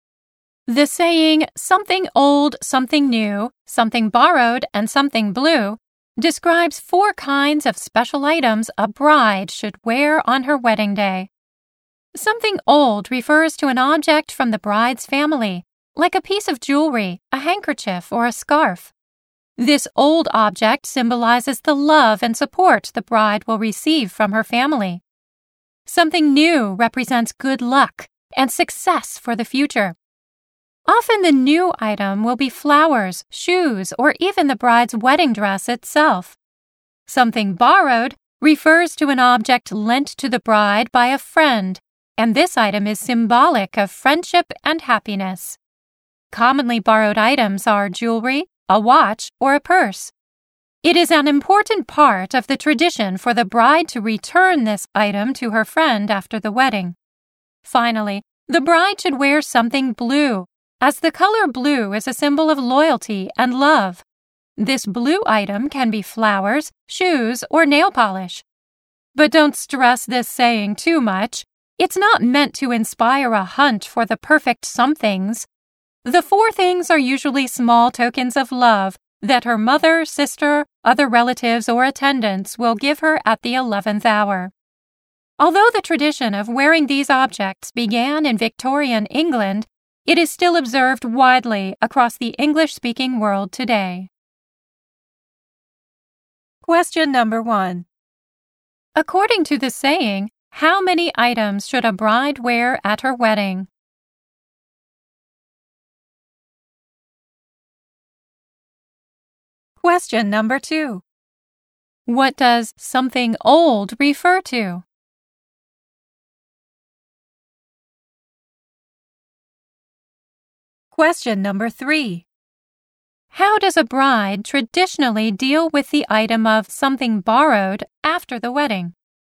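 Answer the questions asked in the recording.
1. Four
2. An object from the bride's family, like jewelry, a handkerchief, or a scarf
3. She returns it to her friend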